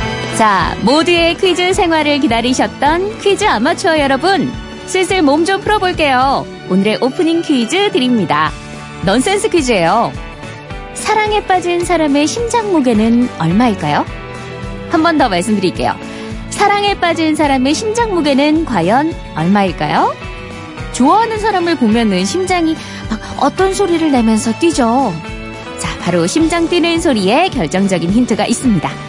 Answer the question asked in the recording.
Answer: 정답은 두근 두근 합이 네근이죠.